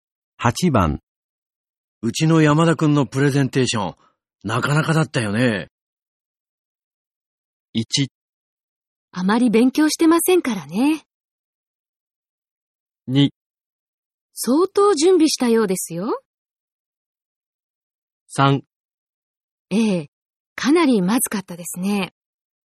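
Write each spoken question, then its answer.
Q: うちの山田くんのプレゼンテーション、なかなかだったよね。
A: 2: 相当準備したようですよ。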